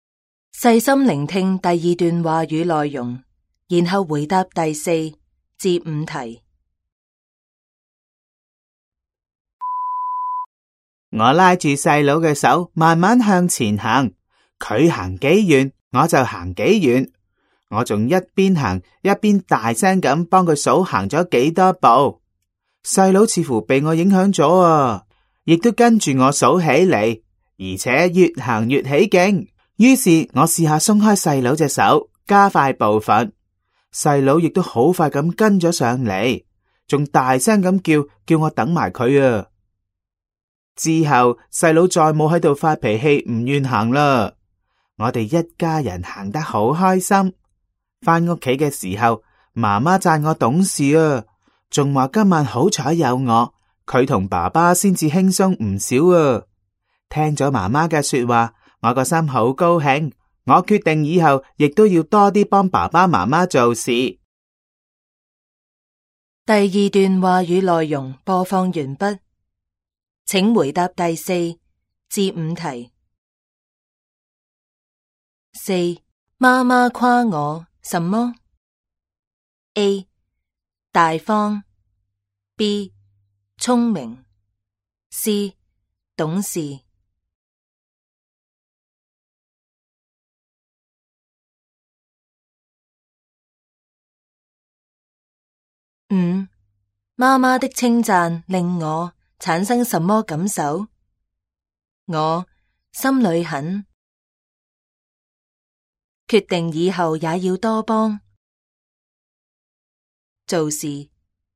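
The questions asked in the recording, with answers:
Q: 妈妈夸我什么? A 大方, B 聪明, C 懂事。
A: C: 懂事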